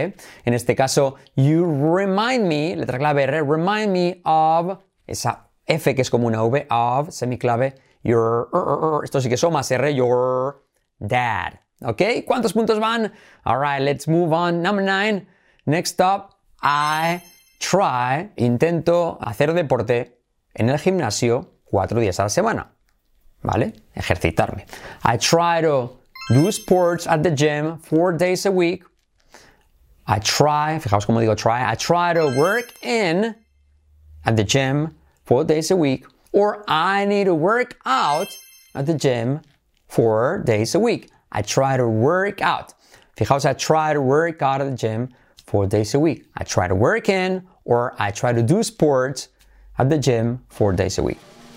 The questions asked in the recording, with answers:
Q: I try to work in or I try to do sports at the gym 4 days a week.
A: So I try to work out at the gym 4 days a week.